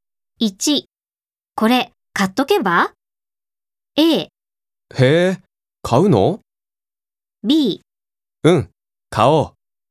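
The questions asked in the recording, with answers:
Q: これ買っとけば?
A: B: うん、買おう。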